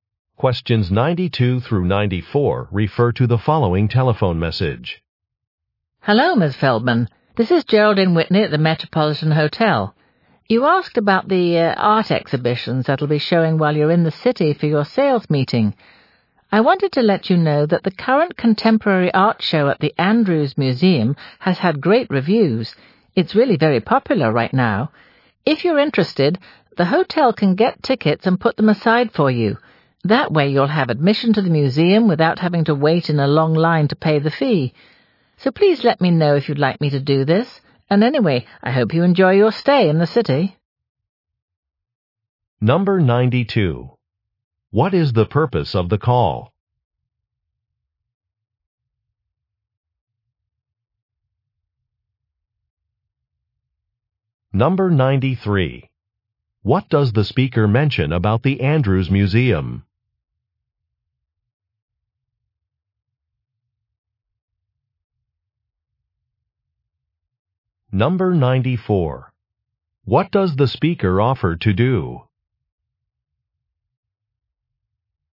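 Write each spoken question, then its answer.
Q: What is the purpose of the call?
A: To give information about an art exhibition

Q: What does the speaker mention about the Andrews Museum?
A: Its contemporary art show is very popular

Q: What does the speaker offer to do?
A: Get tickets and reserve them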